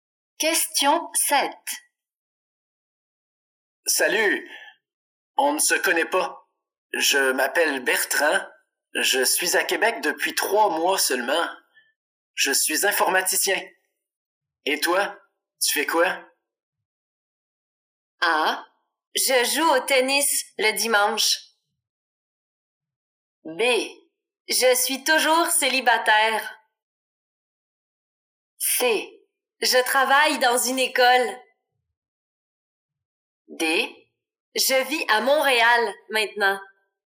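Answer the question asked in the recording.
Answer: C: je travaille dans une école.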